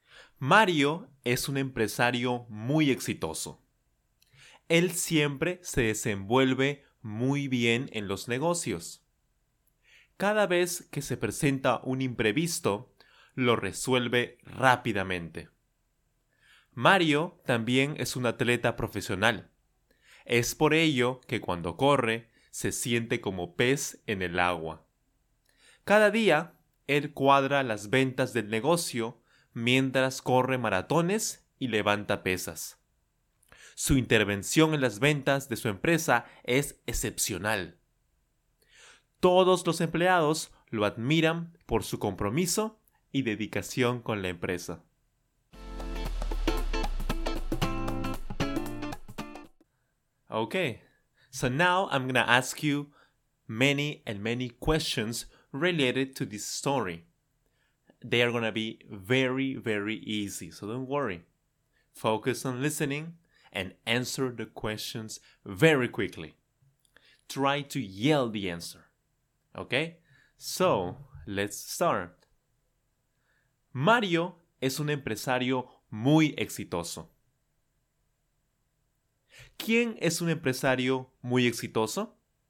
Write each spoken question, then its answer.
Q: ¿Quién es un empresario muy exitoso?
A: Mario, por supuesto, Mario.